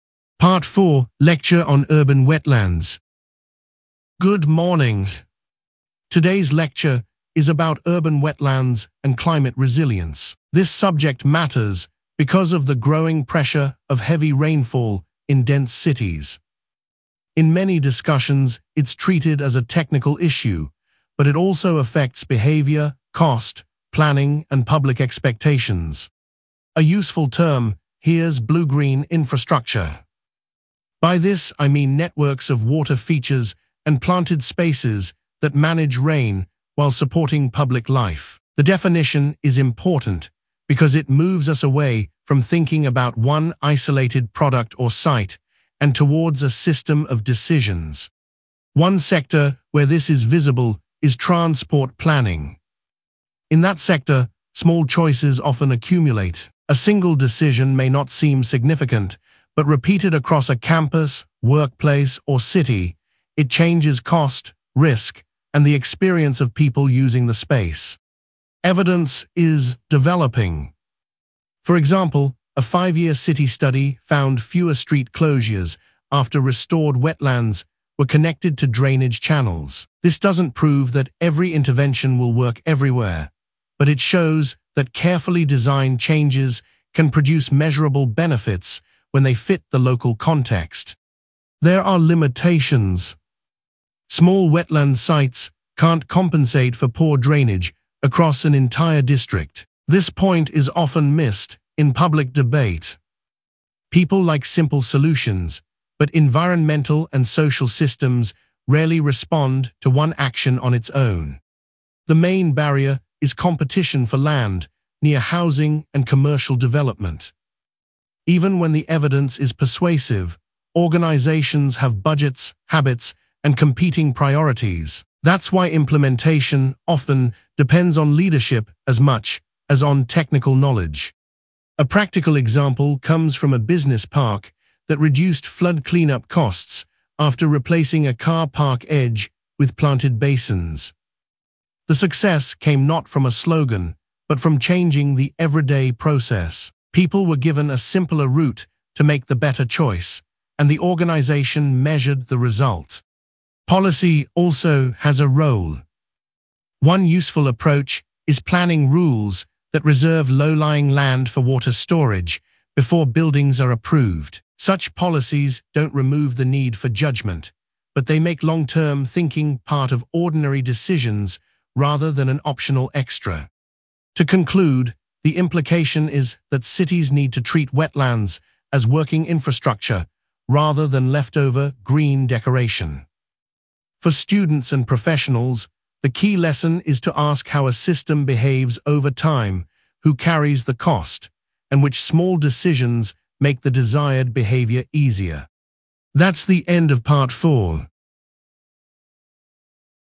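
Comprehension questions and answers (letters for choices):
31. What is the main topic of the lecture?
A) urban wetlands and climate resilience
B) the history of public libraries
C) language change in childhood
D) international trade law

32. What primary cause or pressure does the lecturer mention?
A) a fall in student numbers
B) the cost of museum tickets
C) the growing pressure of heavy rainfall in dense cities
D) a lack of sports facilities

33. Which sector is used as an example?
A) fashion retail only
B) transport planning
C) restaurant advertising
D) private music tuition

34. What does the term blue-green infrastructure mean?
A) a short-term publicity campaign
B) a law that bans all development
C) a list of personal preferences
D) networks of water features and planted spaces that manage rain while supporting public life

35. What did the study or survey find?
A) a five-year city study found fewer street closures after restored wetlands were connected to drainage channels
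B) no measurable result at all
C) results only in one classroom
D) a rise in international flights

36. What limitation does the lecturer mention?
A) the topic has never been studied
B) all users reject the idea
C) small wetland sites cannot compensate for poor drainage across an entire district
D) it applies only to children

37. What is identified as the main barrier?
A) lack of weather data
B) competition for land near housing and commercial development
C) too many volunteers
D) excessive classroom space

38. What practical example does the lecturer give?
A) a school closing its library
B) a cafe increasing plastic packaging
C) a hospital cancelling training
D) a business park that reduced flood-cleanup costs after replacing a car park edge with planted basins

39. What policy approach is mentioned?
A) planning rules that reserve low-lying land for water storage before buildings are approved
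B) removing all inspection rules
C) allowing only voluntary action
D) banning student research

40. What is the overall implication?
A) short-term savings matter most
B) technology can replace all staff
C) cities need to treat wetlands as working infrastructure rather than leftover green decoration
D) individual habits are irrelevant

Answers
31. A
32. C
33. B
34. D
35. A
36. C
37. B
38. D
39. A
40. C

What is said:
Part 4: Lecture on Urban Wetlands
Lecturer: Good morning. Today's lecture is about urban wetlands and climate resilience. This subject matters because of the growing pressure of heavy rainfall in dense cities. In many discussions it is treated as a technical issue, but it also affects behaviour, cost, planning, and public expectations.
Lecturer: A useful term here is blue-green infrastructure. By this I mean networks of water features and planted spaces that manage rain while supporting public life. 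The definition is important because it moves us away from thinking about one isolated product or site and towards a system of decisions.
Lecturer: One sector where this is visible is transport planning. In that sector, small choices often accumulate. A single decision may not seem significant, but repeated across a campus, workplace, or city, it changes cost, risk, and the experience of people using the space.
Lecturer: Evidence is developing. For example, a five-year city study found fewer street closures after restored wetlands were connected to drainage channels. This does not prove that every intervention will work everywhere, but it shows that carefully designed changes can produce measurable benefits when they fit the local context.
Lecturer: There are limitations. This point is often missed in public debate. People like simple solutions, but environmental and social systems rarely respond to one action on its own.
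Lecturer: The main barrier is competition for land near housing and commercial development. Even when the evidence is persuasive, organisations have budgets, habits, and competing priorities. That is why implementation often depends on leadership as much as on technical knowledge.
Lecturer: A practical example comes from a business park that reduced flood-cleanup costs after replacing a car park edge with planted basins. The success came not from a slogan, but from changing the everyday process. People were given a simpler route to make the better choice, and the organisation measured the result.
Lecturer: Policy also has a role. One useful approach is planning rules that reserve low-lying land for water storage before buildings are approved. Such policies do not remove the need for judgement, but they make long-term thinking part of ordinary decisions rather than an optional extra.
Lecturer: To conclude, the implication is that cities need to treat wetlands as working infrastructure rather than leftover green decoration. 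For students and professionals, the key lesson is to ask how a system behaves over time, who carries the cost, and which small decisions make the desired behaviour easier.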